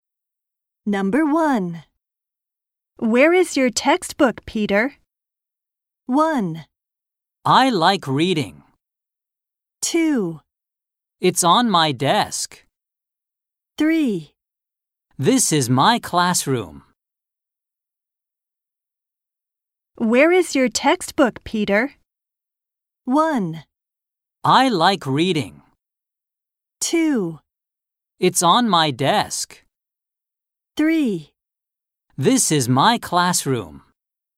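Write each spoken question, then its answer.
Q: Where is your textbook, Peter?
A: 2: It's on my desk.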